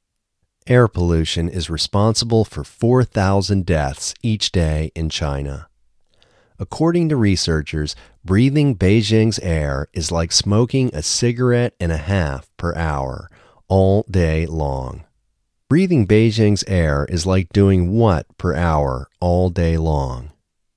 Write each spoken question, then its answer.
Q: Breathing Beijing's air is like doing what per hour, all day long?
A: Breathing Beijing's air is like smoking a cigarette and a half per hour all day long.